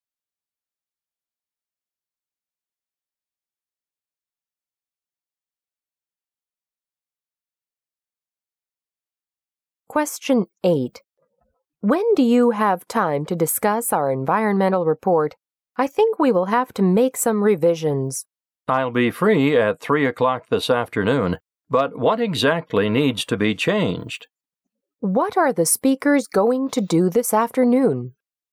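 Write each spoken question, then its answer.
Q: What are the speakers going to do this afternoon?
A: Discuss revisions to their environmental report.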